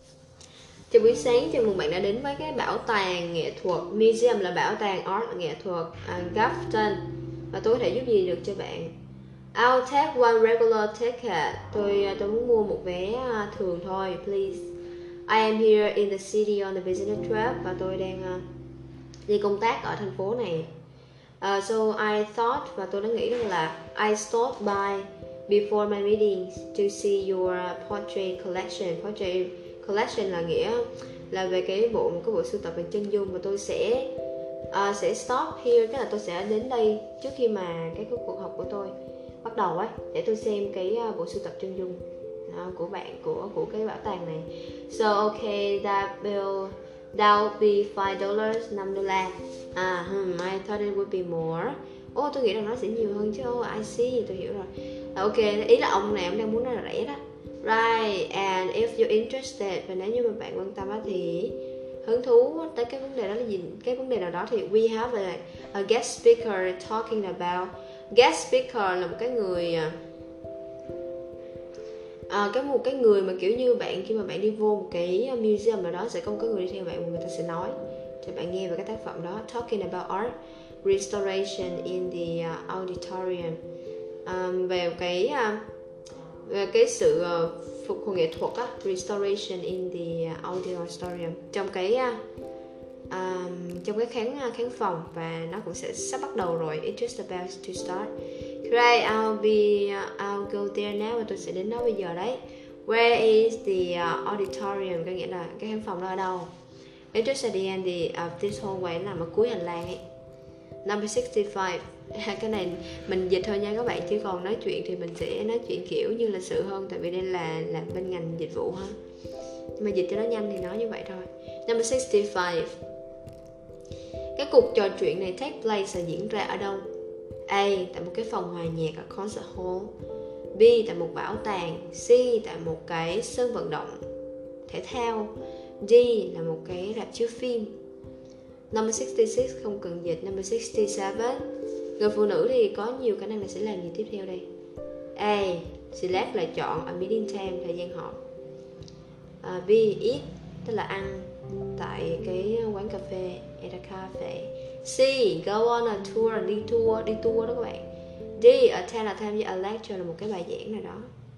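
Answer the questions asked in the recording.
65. B: tại một bảo tàng
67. D: tham dự một bài giảng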